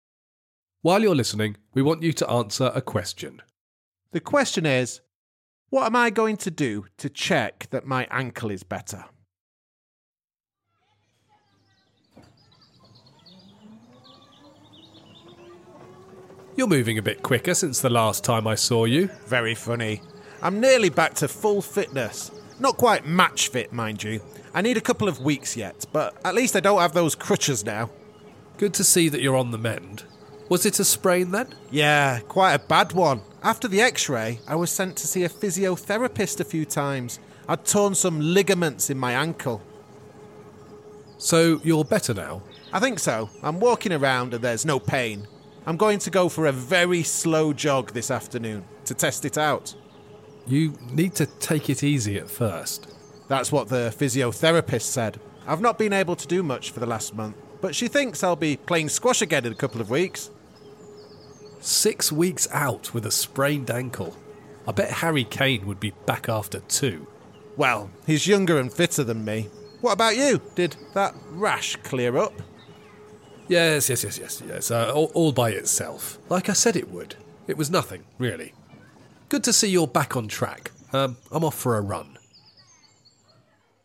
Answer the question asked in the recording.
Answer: I decided that I'd go for a slow jog.